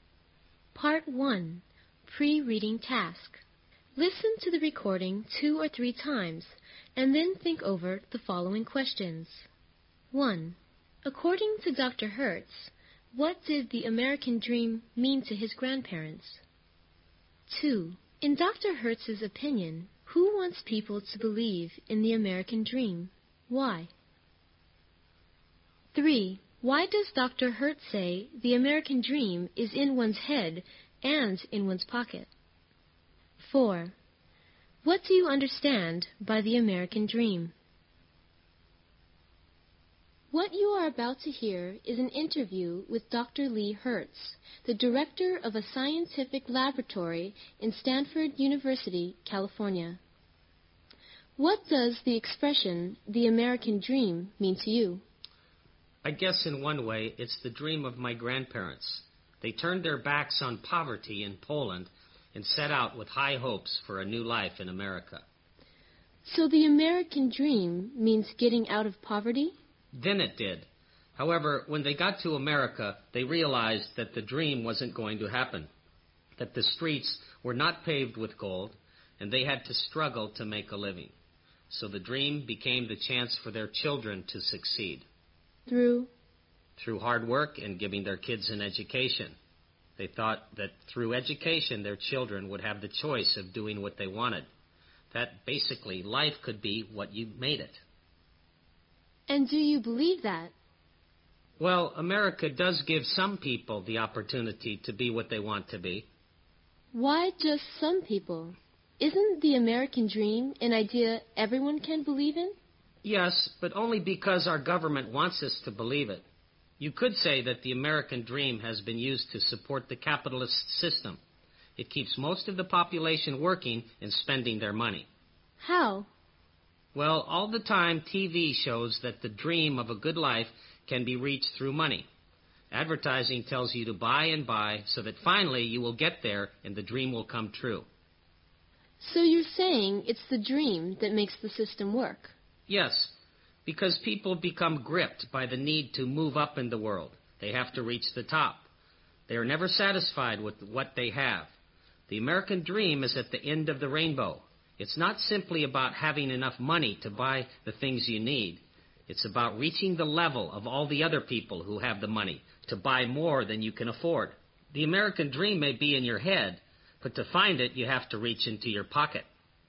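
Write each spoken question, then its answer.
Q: According to Dr. Hertz, what did the American Dream mean to his grandparents?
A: Getting out of poverty and starting a new life in America; then the chance for their children to succeed through hard work and education

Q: In Dr. Hertz's opinion, who wants people to believe in the American Dream?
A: The government, because the dream supports the capitalist system by keeping people working and spending their money

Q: Why does Dr. Hertz say the American Dream is in one's head and in one's pocket?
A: Because it is an idea, but you can only reach it by spending money to reach the level of people who can buy more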